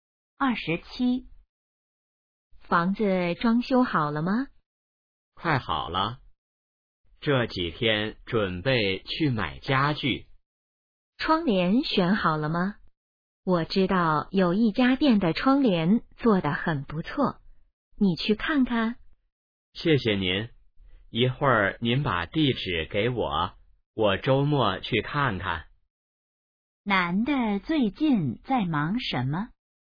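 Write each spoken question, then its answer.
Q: 男的最近在忙什么?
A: 装修房子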